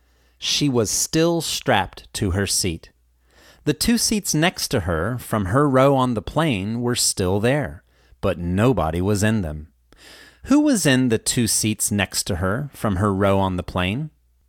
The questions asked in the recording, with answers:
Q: Who was in the two seats next to her, from her row on the plane?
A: Nobody was in the two seats next to her from the row on the plane.